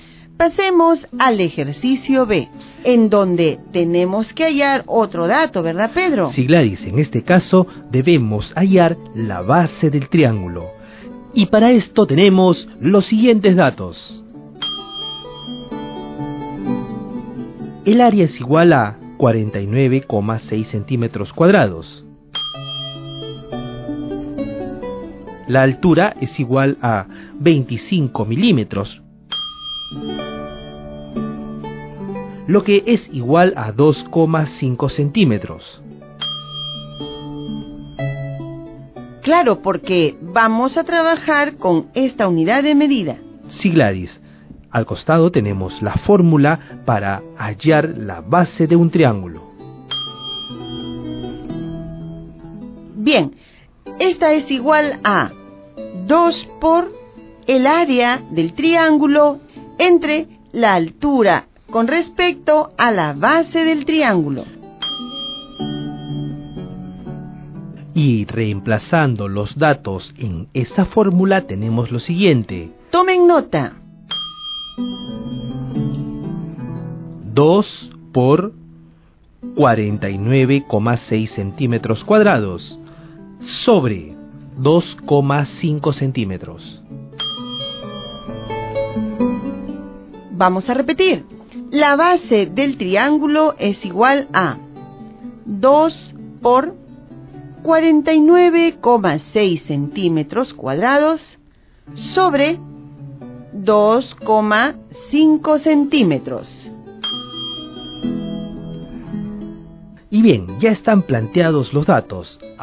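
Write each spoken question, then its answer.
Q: En este caso, debemos hallar la base del triángulo.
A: 39,68 cm (2 × 49,6 / 2,5)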